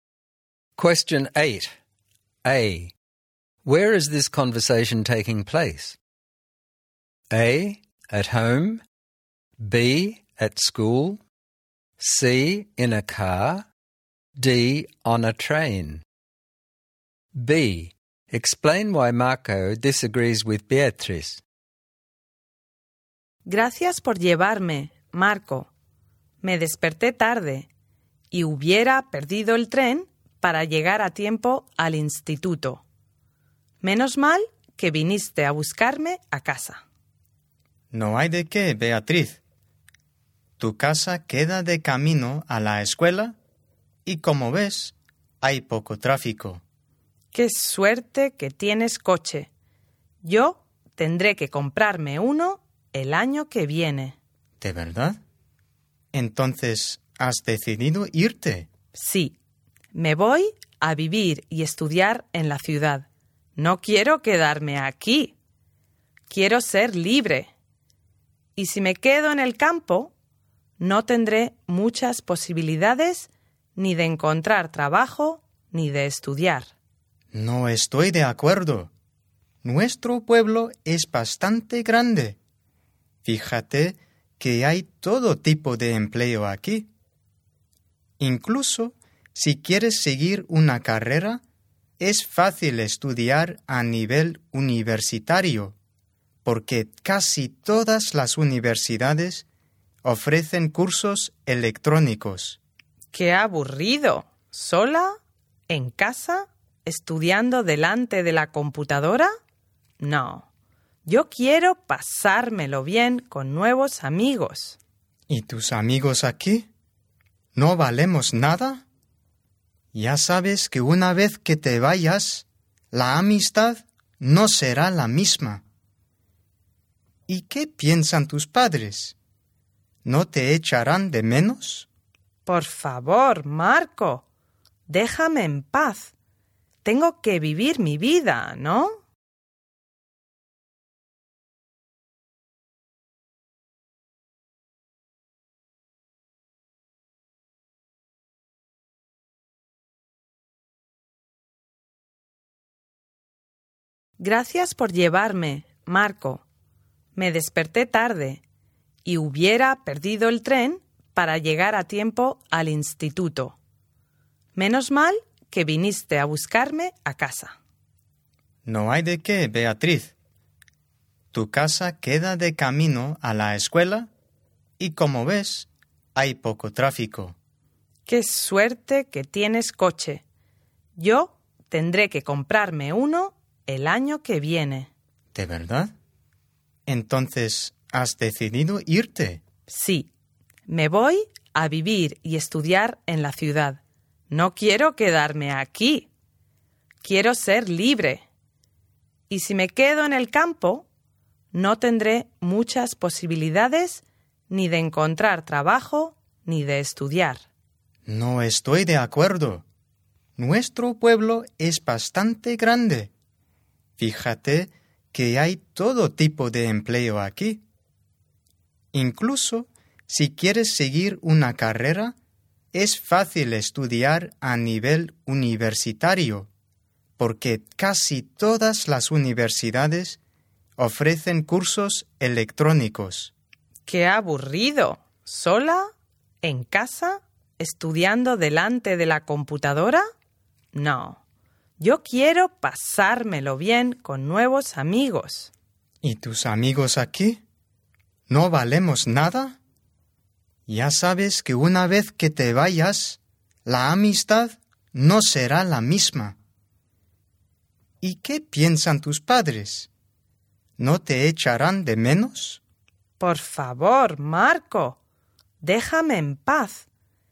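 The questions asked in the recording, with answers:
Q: Where is this conversation taking place?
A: C: In a car

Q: Explain why Marco disagrees with Beatriz.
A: He thinks their town is big enough, has all kinds of jobs, and she can study university courses online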